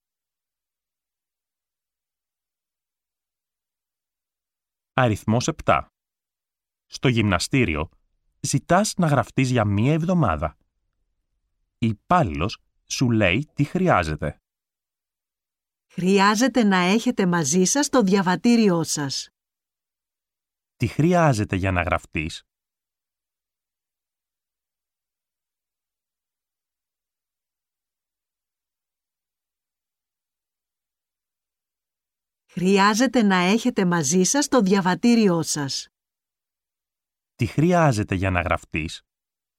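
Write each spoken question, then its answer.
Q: Τι χρειάζεται για να γραφτείς?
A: Το διαβατήριο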